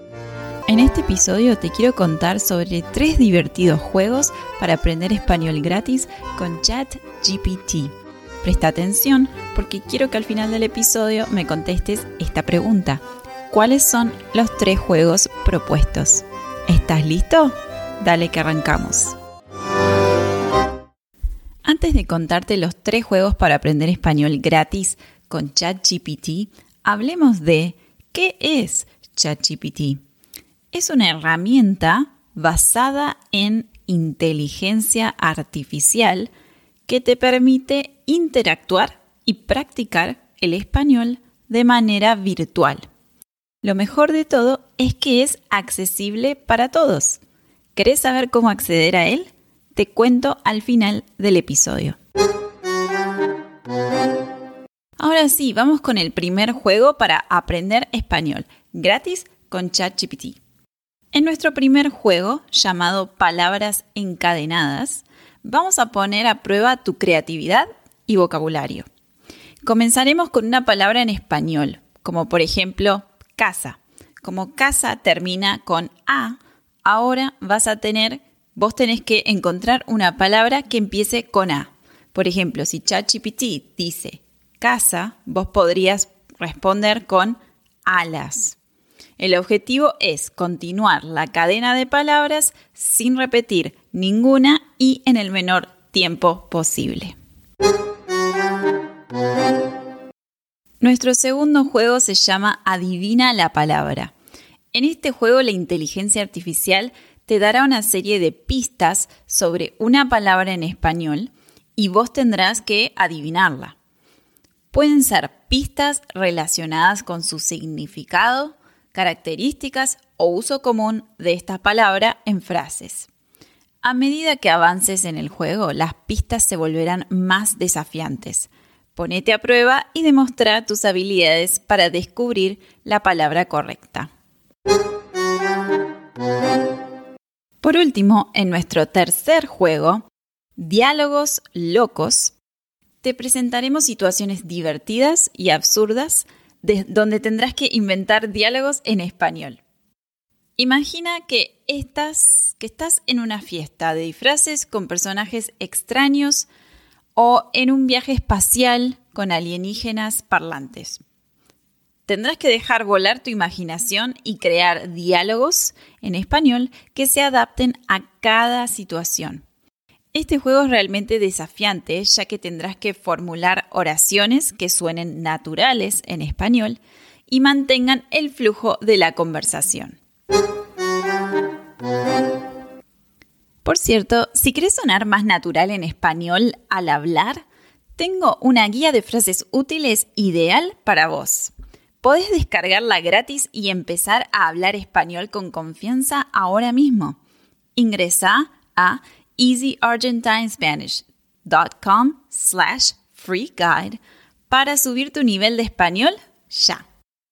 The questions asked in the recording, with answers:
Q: ¿Cuáles son los tres juegos propuestos?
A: En resumen, los tres juegos divertidos para aprender español gratis con ChatGPT son palabras encadenadas, adivina la palabra y diálogos locos.